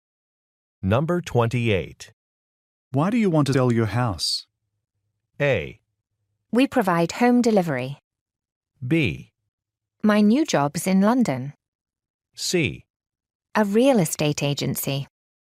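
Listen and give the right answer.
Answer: B: My new job's in London.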